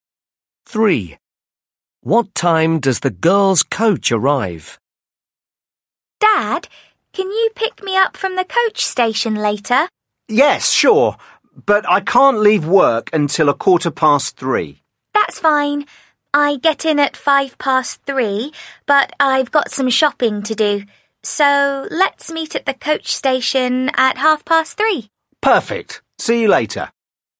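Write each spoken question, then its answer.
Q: What time does the girls' coach arrive?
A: 3:05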